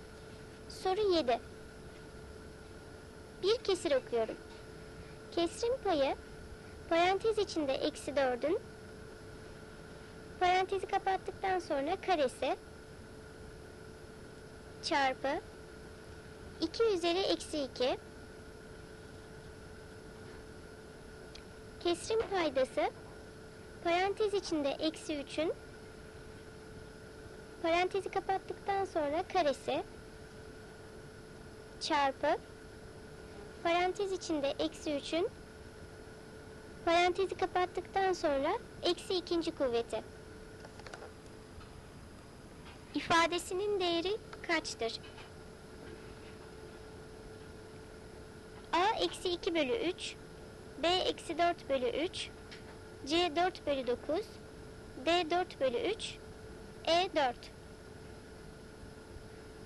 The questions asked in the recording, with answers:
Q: kuvveti. İfadesinin değeri kaçtır?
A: Doğru cevap E 4.